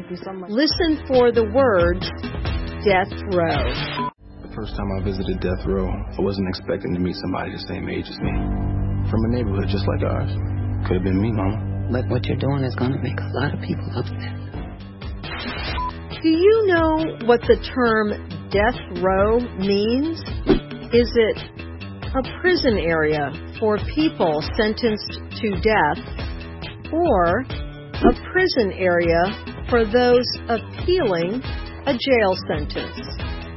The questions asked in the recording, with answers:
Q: Do you know what the term death row means?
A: The answer is A. Death row is a prison area for people sentenced to death.